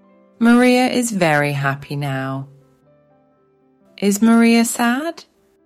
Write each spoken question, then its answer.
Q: Is Maria sad?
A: No, she's not. She's very happy.